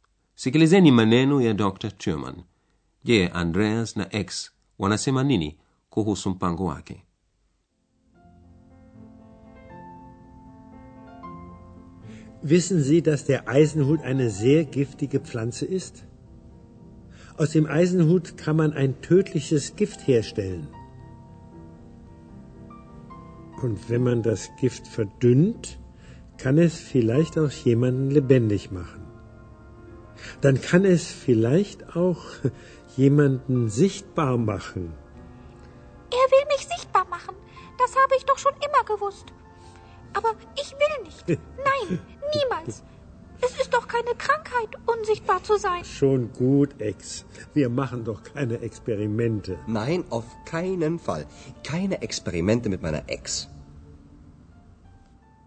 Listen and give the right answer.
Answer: Andreas na ex furahishwa nam pango huo.